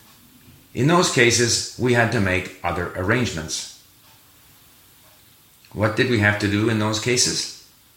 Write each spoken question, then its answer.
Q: What did we have to do in those cases?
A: We had to make other arrangements in those cases.